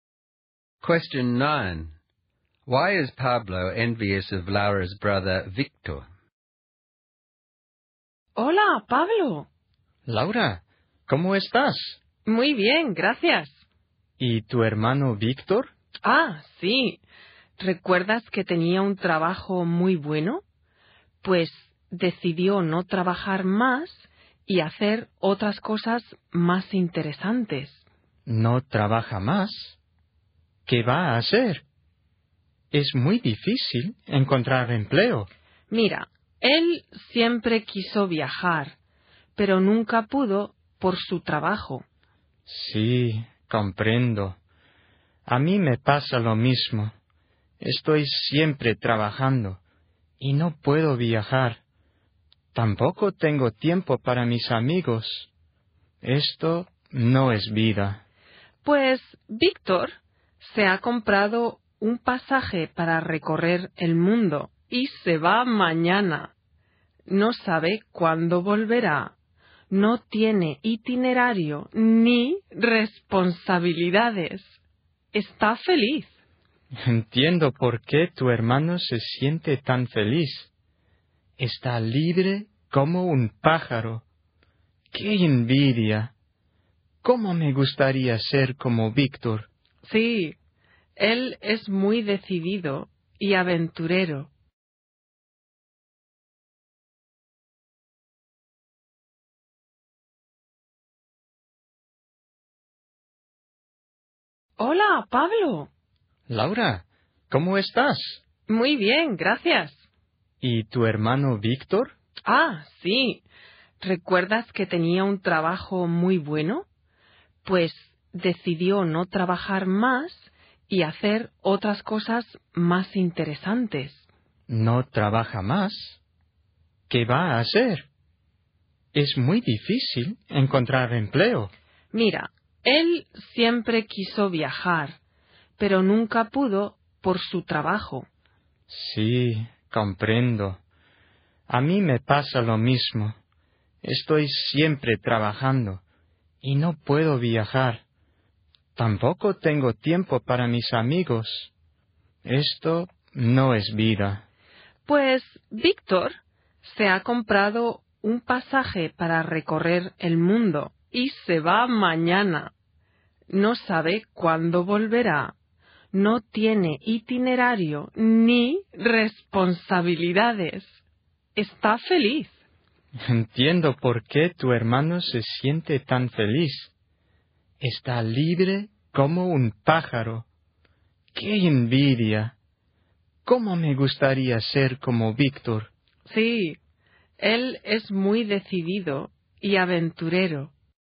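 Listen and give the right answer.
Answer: Victor has quit his job to travel the world with no plans or responsibilities, while Pablo is always working and has no time to travel or see friends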